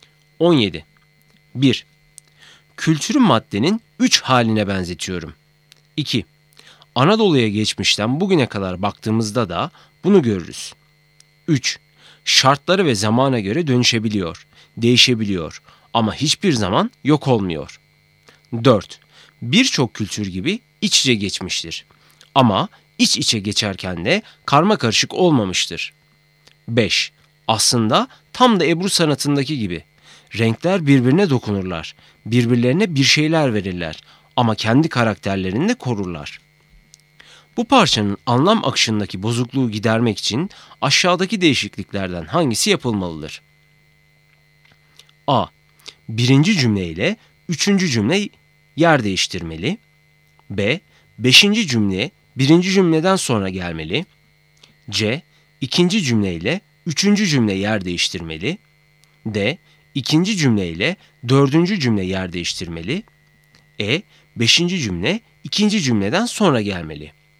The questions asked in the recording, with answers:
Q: Bu parçanın anlam akışındaki bozukluğu gidermek için aşağıdaki değişikliklerden hangisi yapılmalıdır?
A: Doğru cevap C. İkinci cümle ile üçüncü cümle yer değiştirmeli.